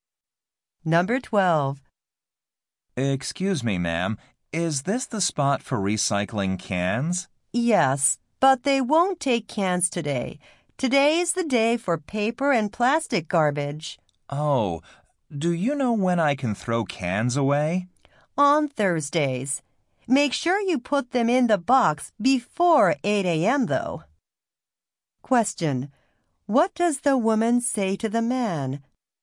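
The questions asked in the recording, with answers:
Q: What does the woman say to the man?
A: Cans can only be put out on Thursdays, before 8 a.m.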